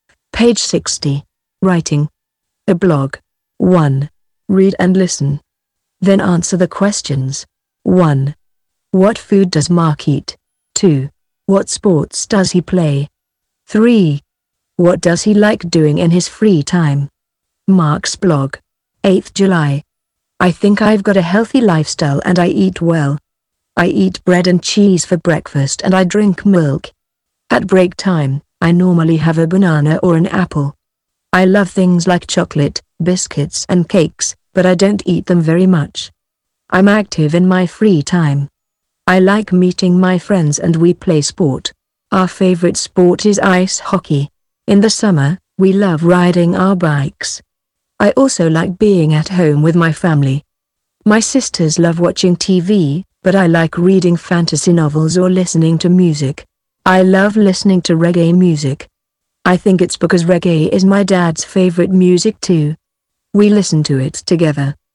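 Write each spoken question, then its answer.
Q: What food does Mark eat?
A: Bread and cheese, milk, bananas or apples

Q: What sports does he play?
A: Ice hockey (and he rides his bike in summer)

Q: What does he like doing in his free time?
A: Meeting friends, playing sport, reading fantasy novels and listening to reggae music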